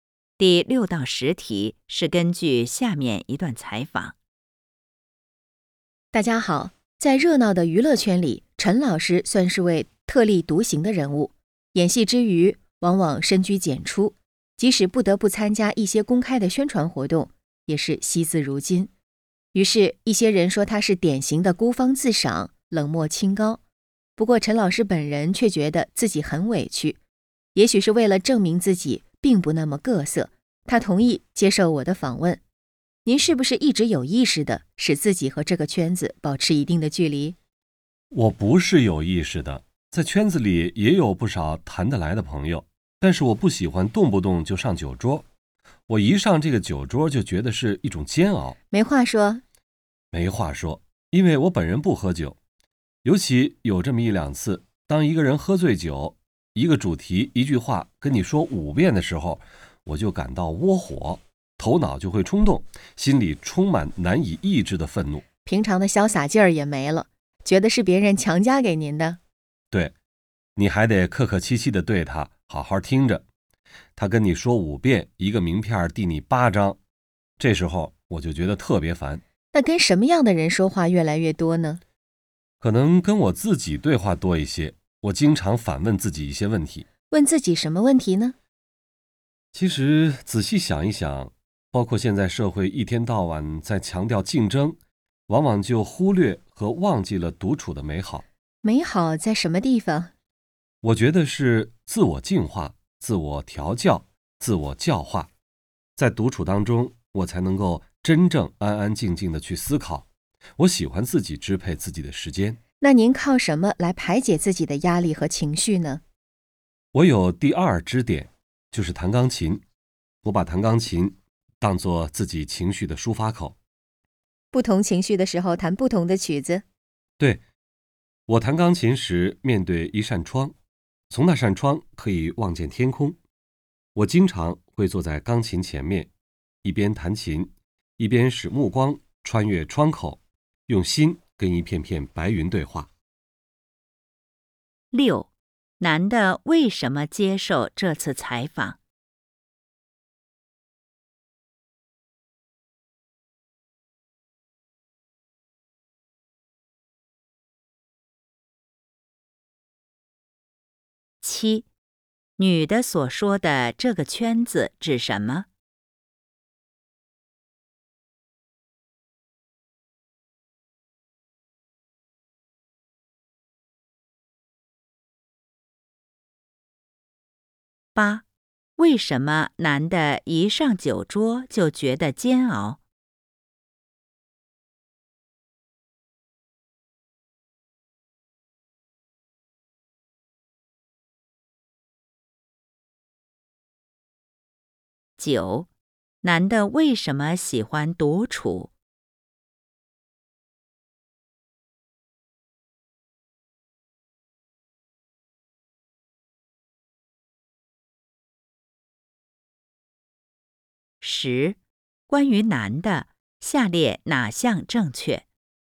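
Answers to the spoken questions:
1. 为了证明自己并不那么各色
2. 娱乐圈
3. 他不喝酒,没话说,烦醉酒的人一句话说好几遍
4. 独处能自我净化,能安安静静地思考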